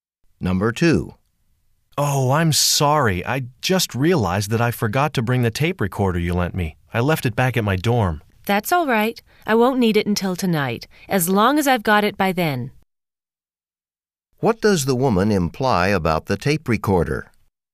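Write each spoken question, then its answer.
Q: What does the woman imply about the tape recorder?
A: He can return it later; she doesn't need it until tonight.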